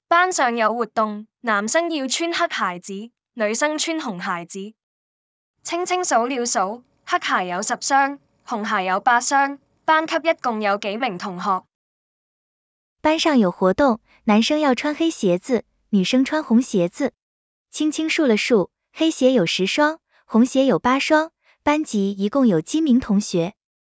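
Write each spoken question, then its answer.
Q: 班级一共有几名同学。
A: 18名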